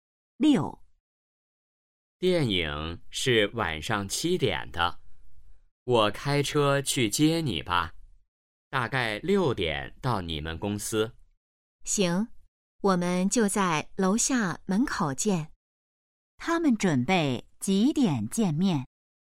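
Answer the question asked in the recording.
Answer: 6点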